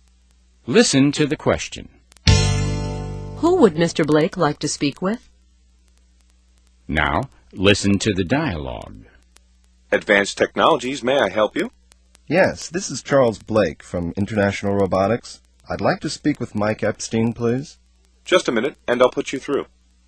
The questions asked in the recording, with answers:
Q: Who would Mr. Blake like to speak with?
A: He'd like to speak with Mr.